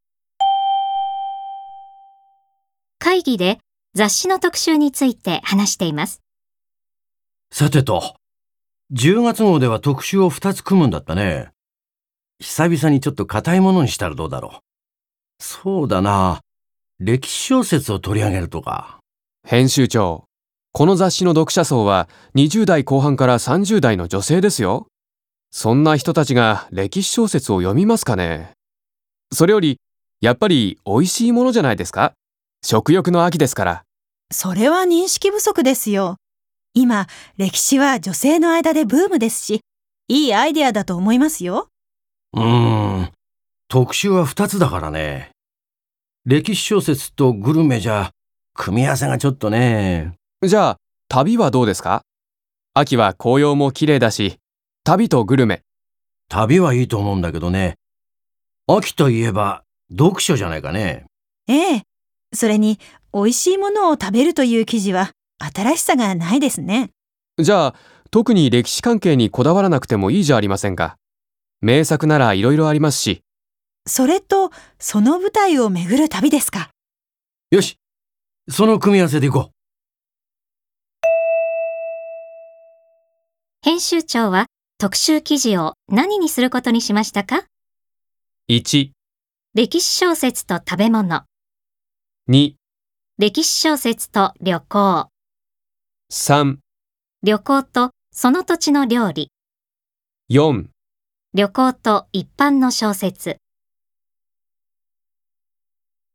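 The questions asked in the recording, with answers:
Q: 編集長は特集記事を何にすることにしましたか。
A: 4: 旅行と一般の小説。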